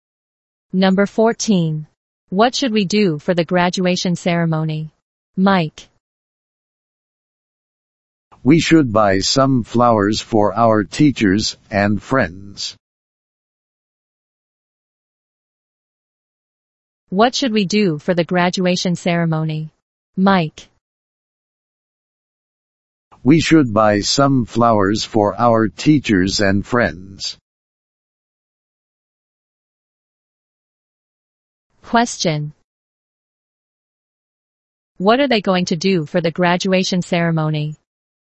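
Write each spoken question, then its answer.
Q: What are they going to do for the graduation ceremony?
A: Buy some flowers for their teachers and friends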